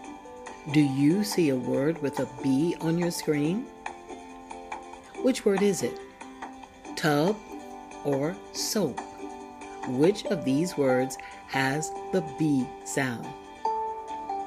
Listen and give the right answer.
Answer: You are right again. Tub.